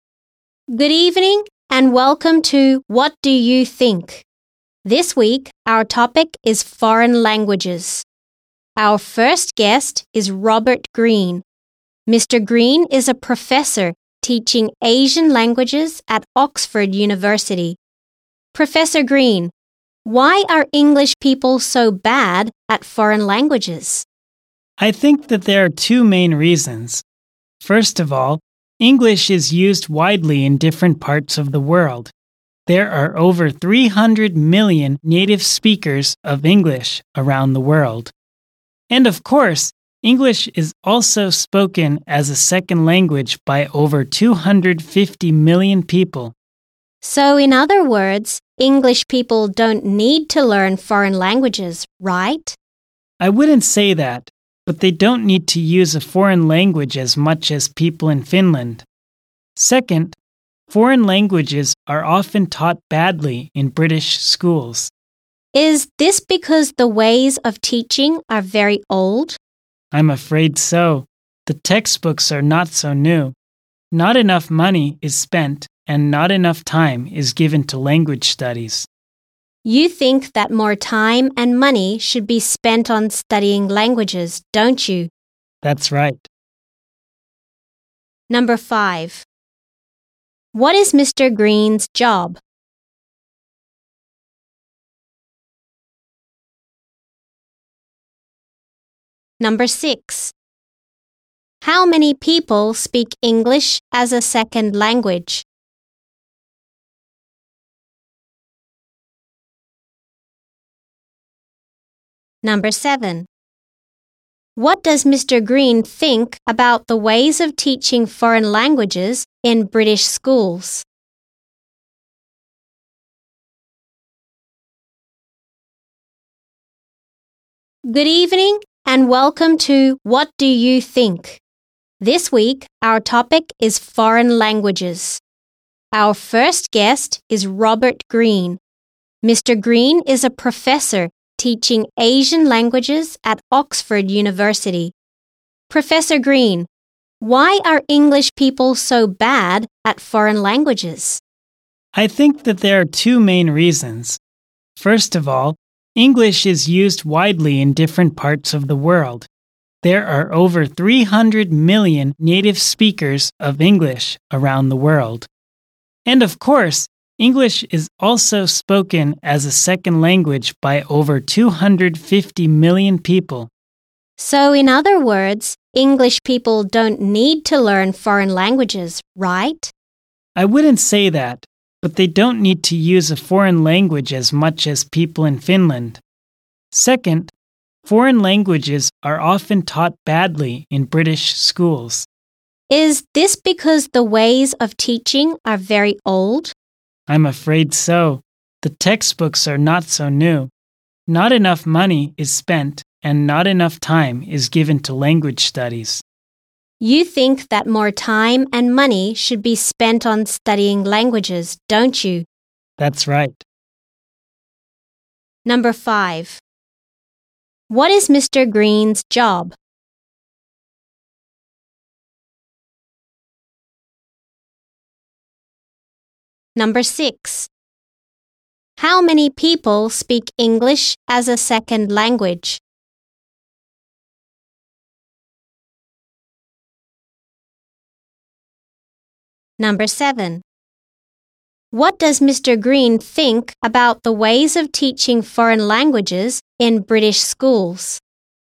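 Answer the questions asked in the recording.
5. He is a professor teaching Asian languages at Oxford University.
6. Over 250 million people.
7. He thinks they are old, and not enough money and time are given.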